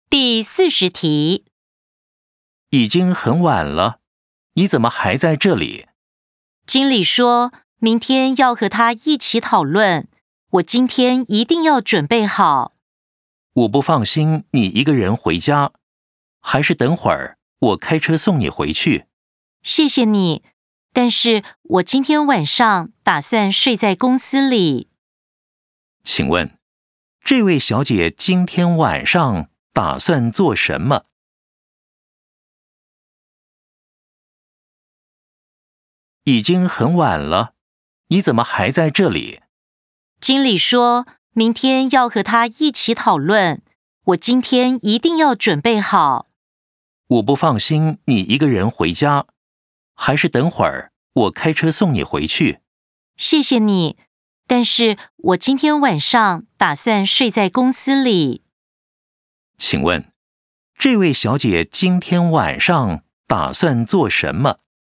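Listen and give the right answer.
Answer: 睡在公司里(准备明天的讨论)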